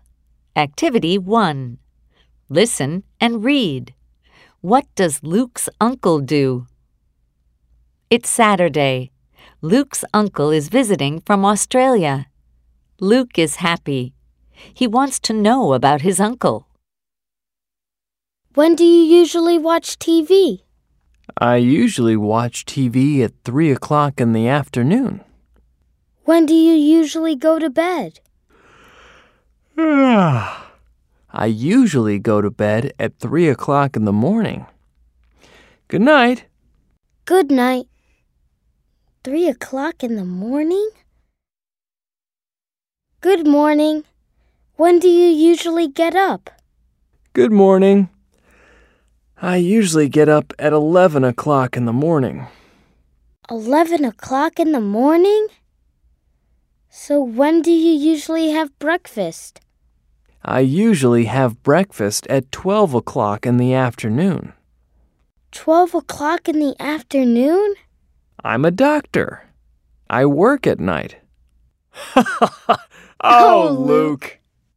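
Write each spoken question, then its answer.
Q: What does Luke's uncle do?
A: He's a doctor.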